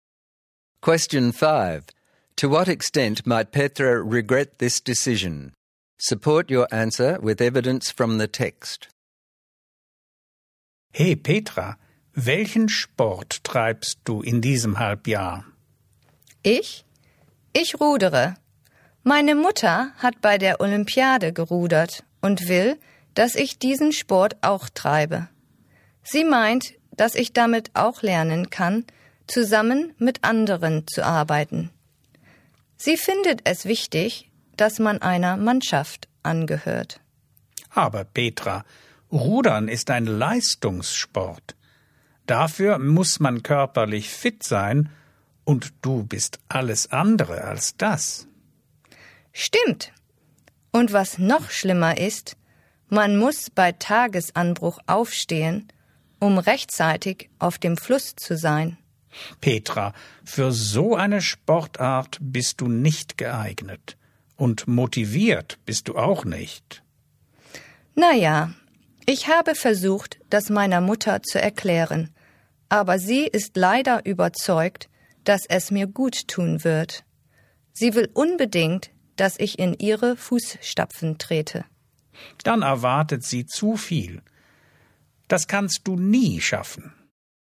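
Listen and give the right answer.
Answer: Greatly: rowing is a competitive sport needing fitness, which she lacks; she must get up at dawn; she is unmotivated and only does it because her mother insists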